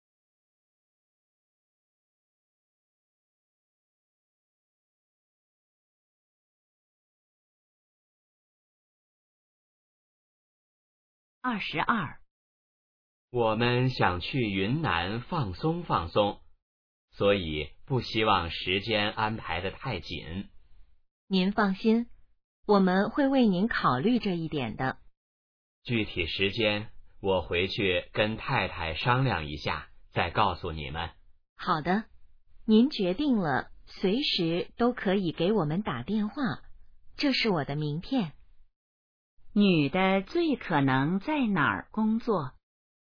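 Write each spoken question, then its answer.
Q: 女的最可能在哪儿工作?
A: 旅行社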